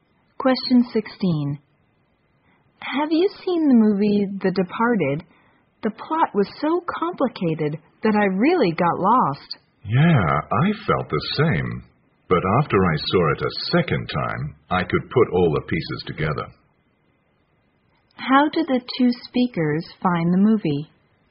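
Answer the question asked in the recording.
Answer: Hard to follow / confusing.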